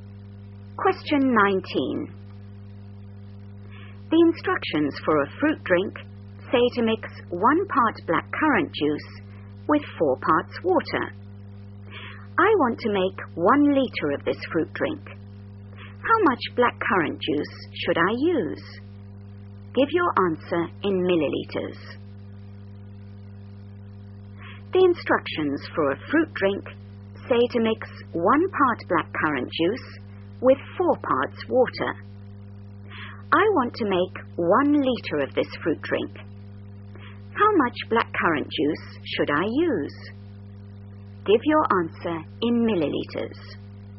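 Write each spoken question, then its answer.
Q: How much blackcurrant juice should I use?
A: 200 ml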